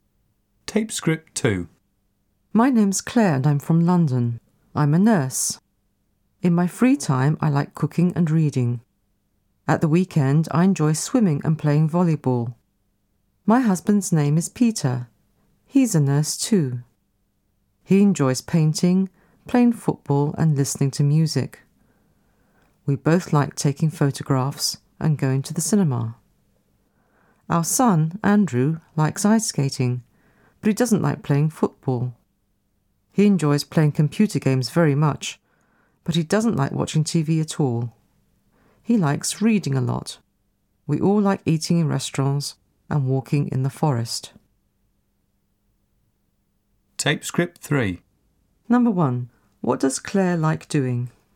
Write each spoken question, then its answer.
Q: What does Claire like doing?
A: She likes cooking and reading.